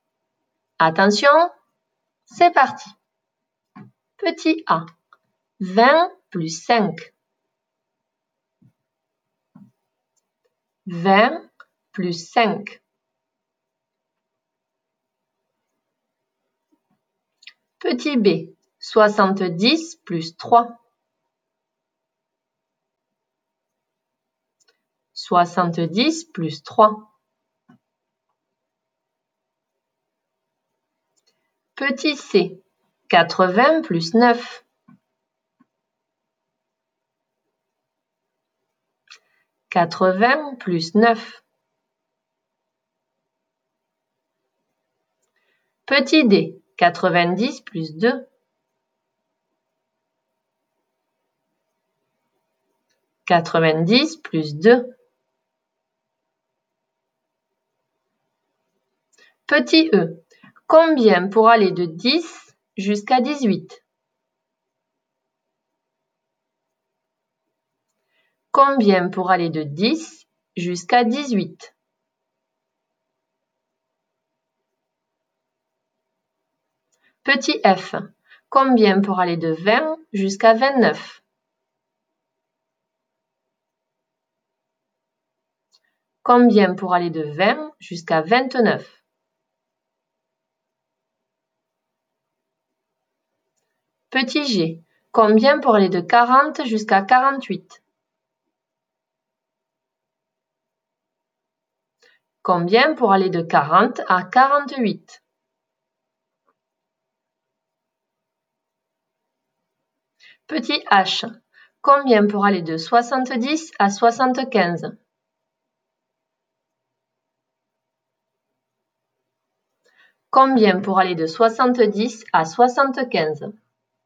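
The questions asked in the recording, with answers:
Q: 20 plus 5.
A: 25

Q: 70 plus 3.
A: 73

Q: 80 plus 9.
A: 89

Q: 90 plus 2.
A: 92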